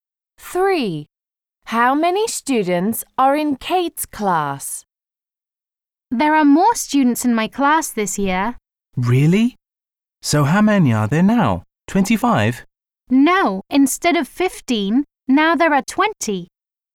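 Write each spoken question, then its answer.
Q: How many students are in Kate's class?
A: 20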